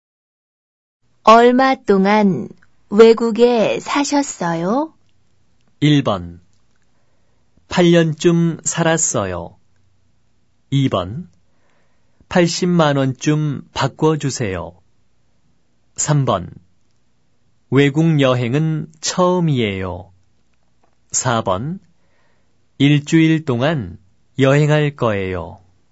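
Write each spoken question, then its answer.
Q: 얼마 동안 외국에 사셨어요?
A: 1: 8년쯤 살았어요.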